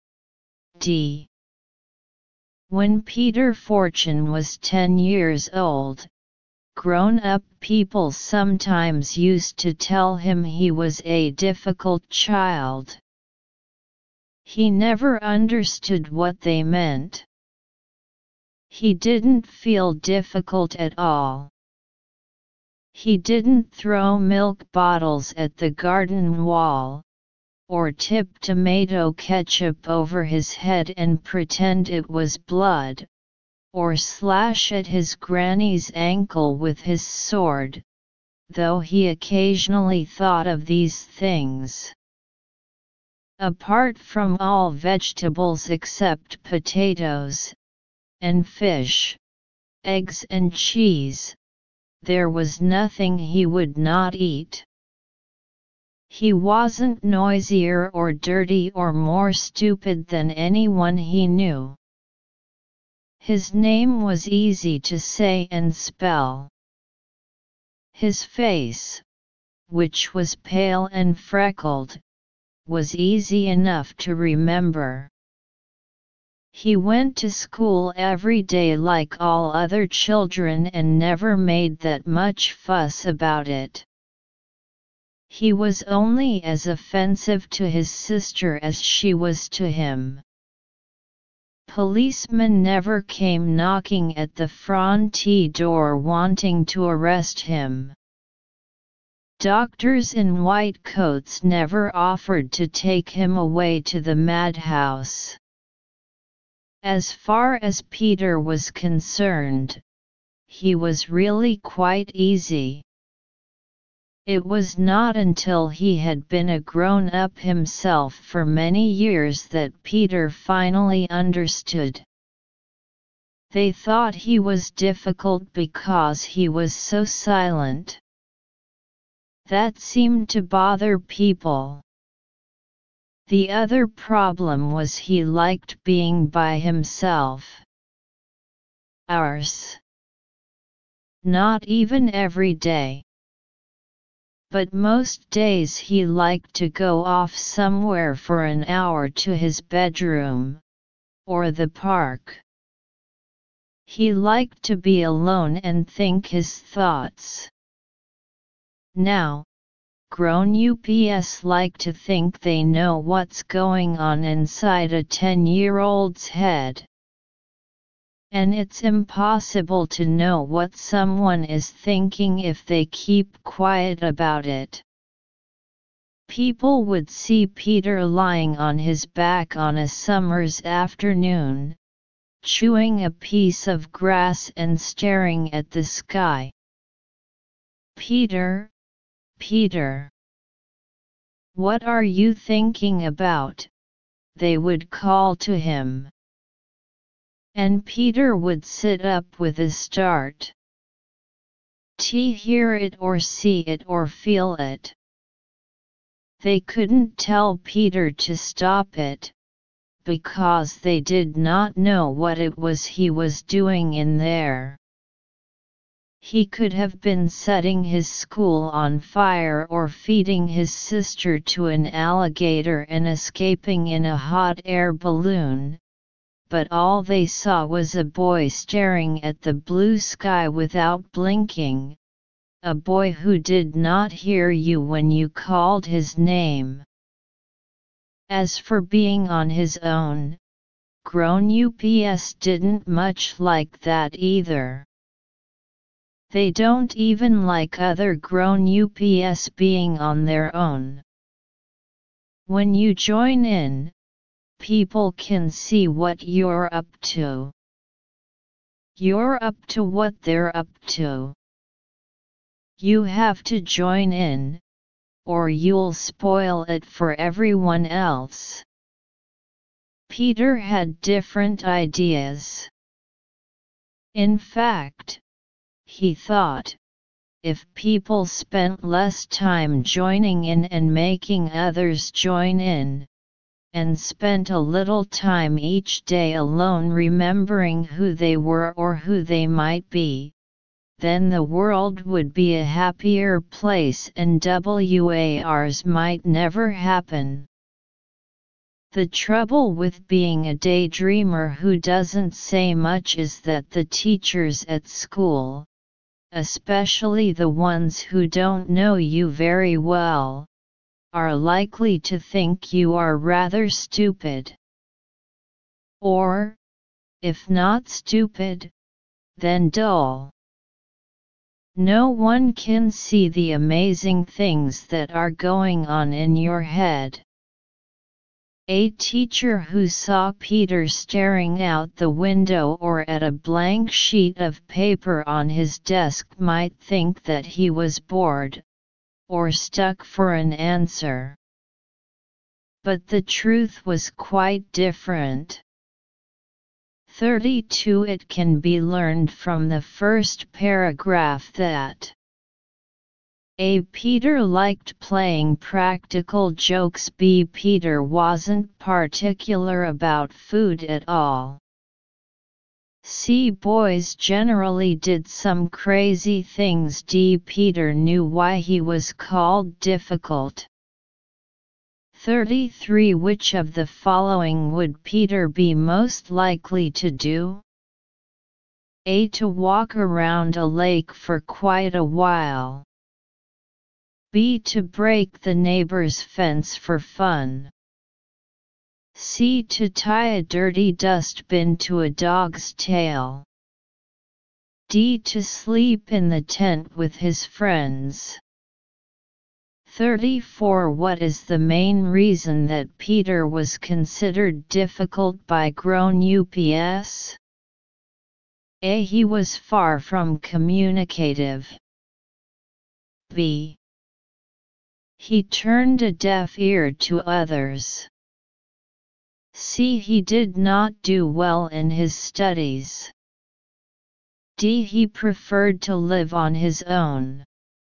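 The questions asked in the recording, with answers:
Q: Which of the following would Peter be most likely to do?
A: A: To walk around a lake for quite a while.

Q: What is the main reason that Peter was considered difficult by grown ups?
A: A: He was far from communicative.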